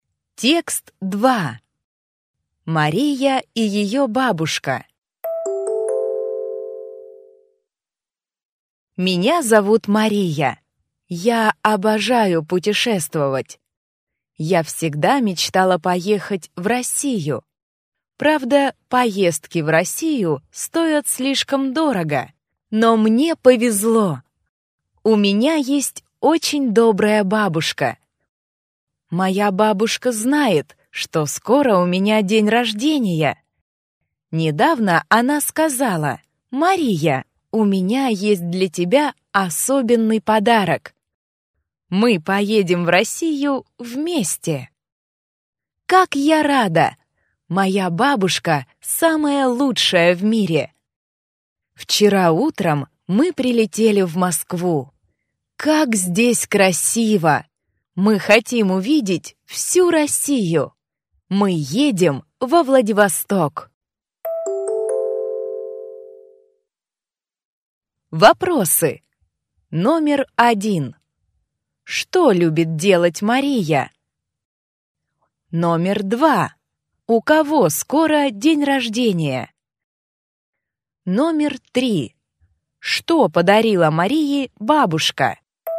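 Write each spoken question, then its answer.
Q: Что любит делать Мария?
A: Путешествовать

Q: У кого скоро день рождения?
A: У Марии

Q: Что подарила Марии бабушка?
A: Поездку в Россию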